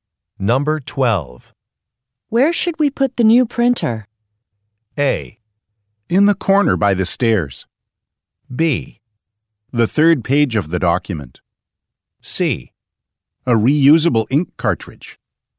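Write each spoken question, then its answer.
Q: Where should we put the new printer?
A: A: In the corner by the stairs.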